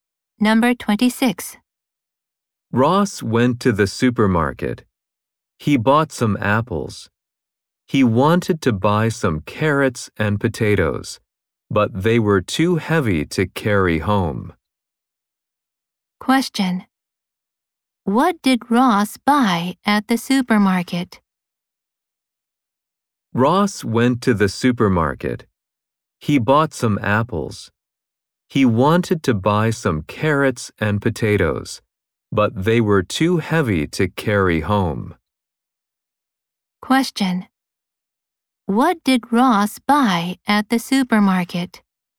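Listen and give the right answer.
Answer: Some apples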